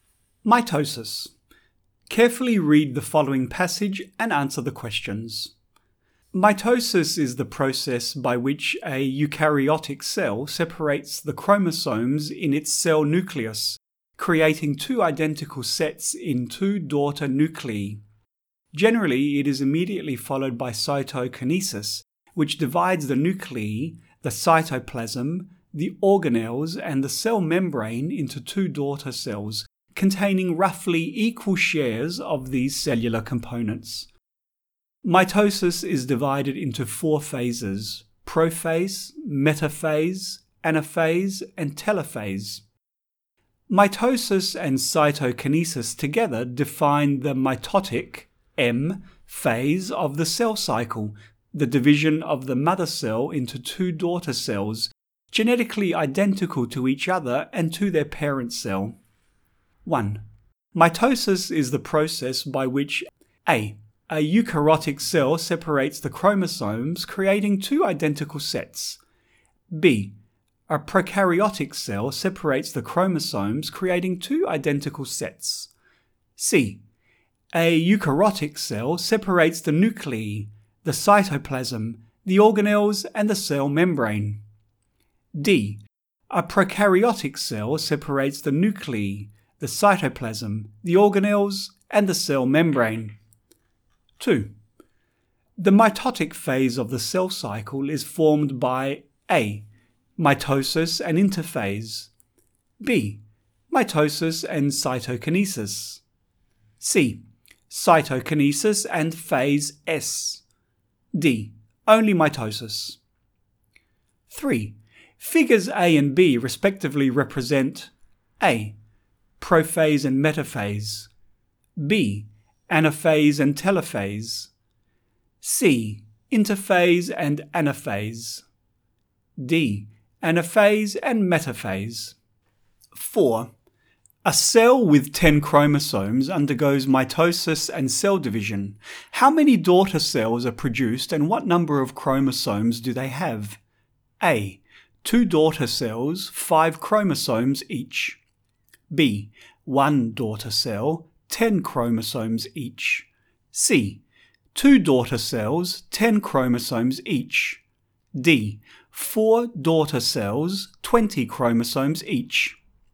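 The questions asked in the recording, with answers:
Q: The mitotic phase of the cell cycle is formed by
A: B: Mitosis and cytokinesis

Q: A cell with 10 chromosomes undergoes mitosis and cell division. How many daughter cells are produced and what number of chromosomes do they have?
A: C: 2 daughter cells, 10 chromosomes each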